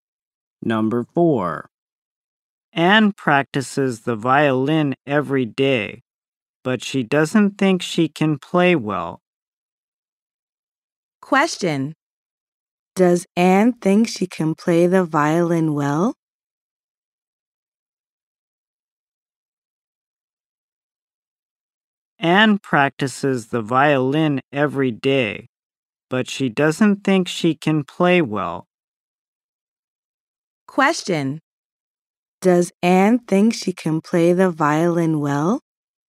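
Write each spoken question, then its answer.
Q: Does Anne think she can play the violin well?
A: No, she doesn't.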